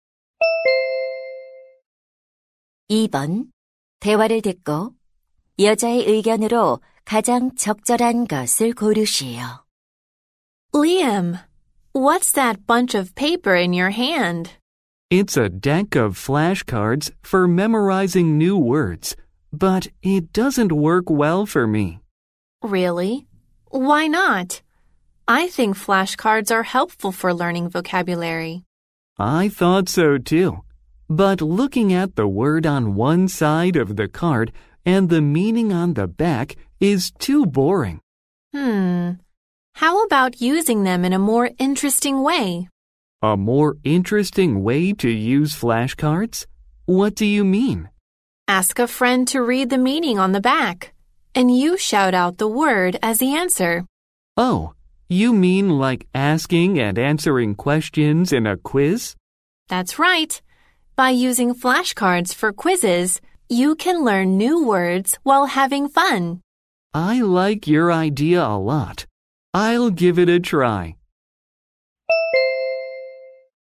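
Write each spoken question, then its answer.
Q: 대화를 듣고 여자의 의견으로 가장 적절한 것을 고르시오.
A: 플래시카드를 퀴즈처럼 활용하면 재미있게 단어를 학습할 수 있다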